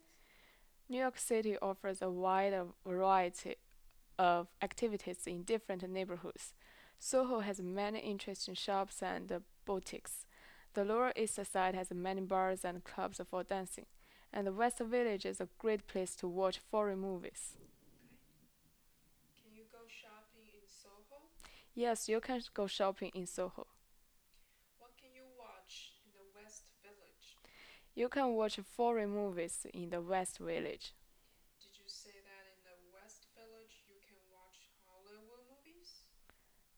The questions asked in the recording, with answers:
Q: Can you go shopping in Soho?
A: Yes, you can go shopping in Soho.

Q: Did you say that in the West Village you can watch Hollywood movies?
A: No, you cannot watch Hollywood movies in West Village.